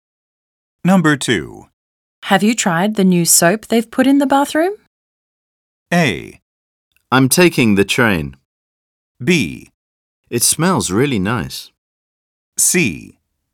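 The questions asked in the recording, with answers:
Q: Have you tried the new soap they've put in the bathroom?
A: B: It smells really nice.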